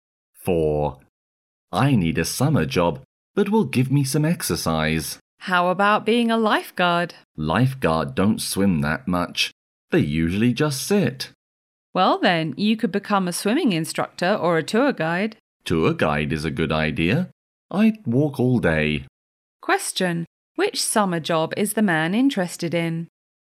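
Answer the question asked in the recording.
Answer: Tour guide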